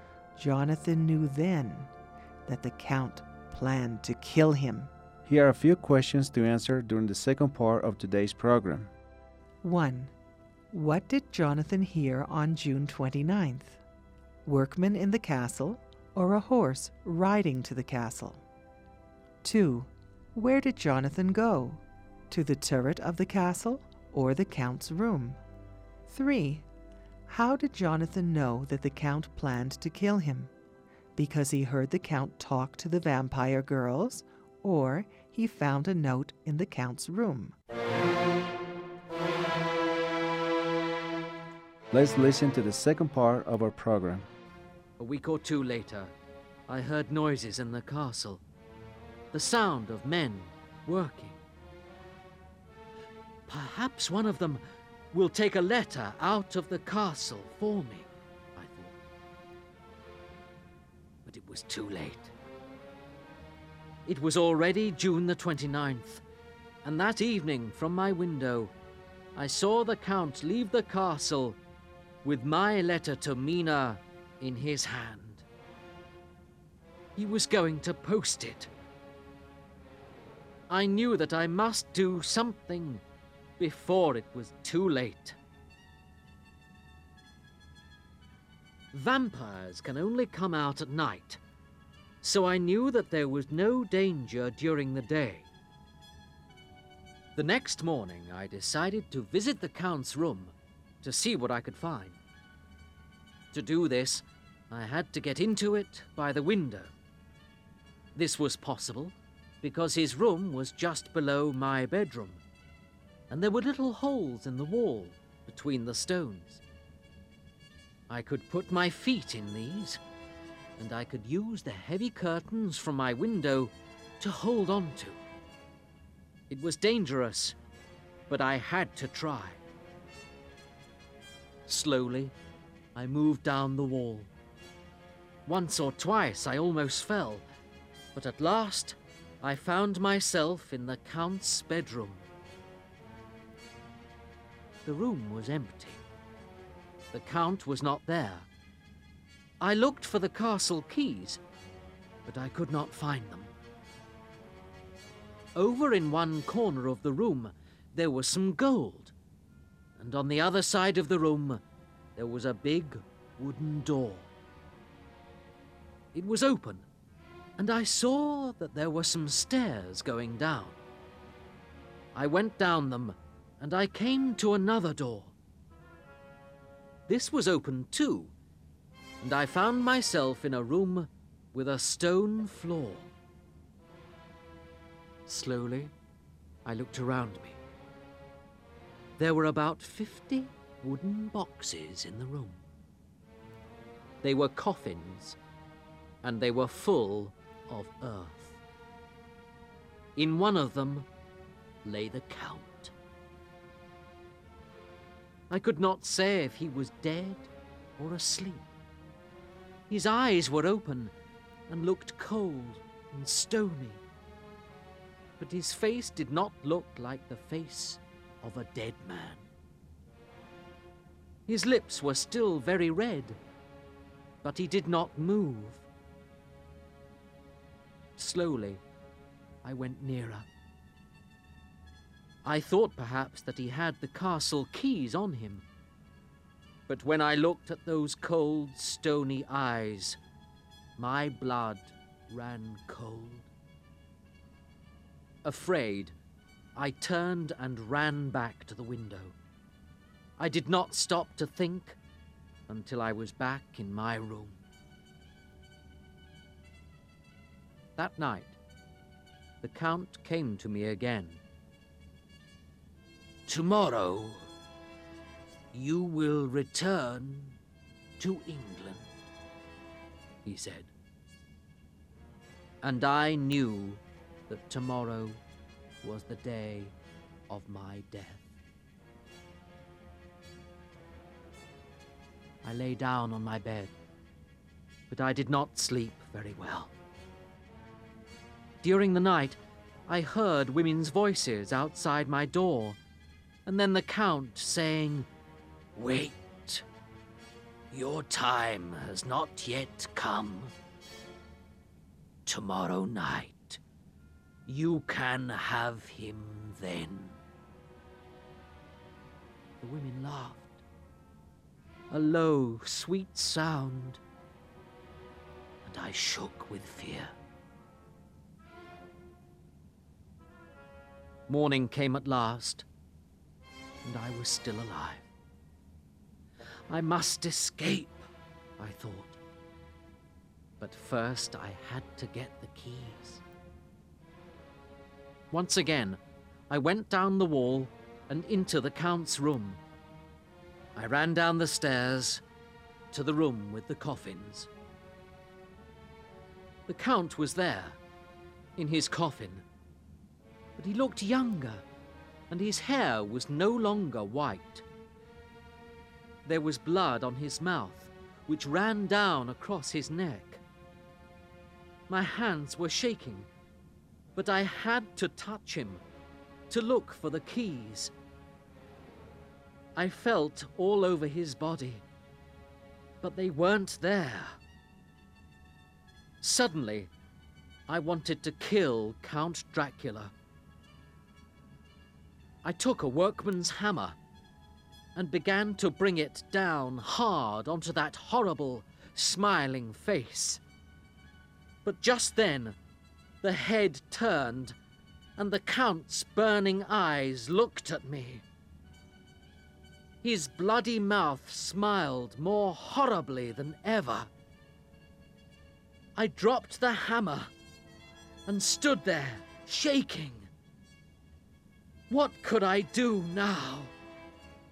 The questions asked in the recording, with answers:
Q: What did Jonathan hear on June 29th? Workmen in the castle or a horse riding to the castle?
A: On June 29th, Jonathan Harker heard the sounds of workmen working.

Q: Where did Jonathan go? To the turret of the castle or the Count's room?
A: Jonathan decided to find the keys to the castle in Count Dracula's room.

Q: How did Jonathan know that the Count planned to kill him? Because he heard the Count talk to the vampire girls, or he found a note in the Count's room?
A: Jonathan knew he planned to kill him then, and heard the Count telling the vampire girls that they could have him, Jonathan, tomorrow.